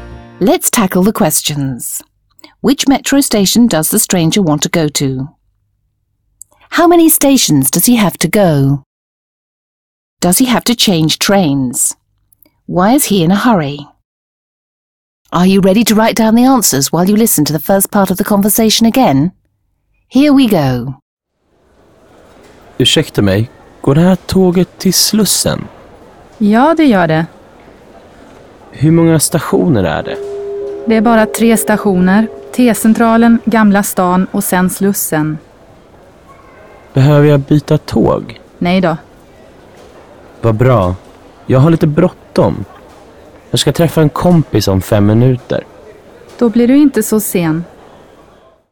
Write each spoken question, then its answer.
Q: Which metro station does the stranger want to go to?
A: He wants to go to Slussen.

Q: How many stations does he have to go?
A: There are only 3 stations.

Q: Does he have to change trains?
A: No, he doesn't have to change trains.

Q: Why is he in a hurry?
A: He's in a hurry because he's going to meet a friend in 5 minutes.